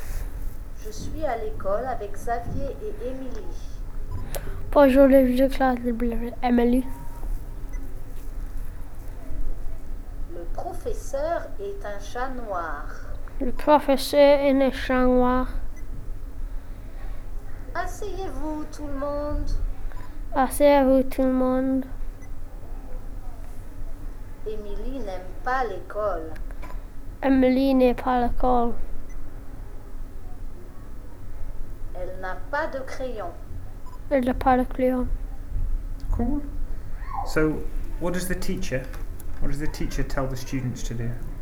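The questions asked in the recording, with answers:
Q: So, what does the teacher, tell the students to do?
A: Sit down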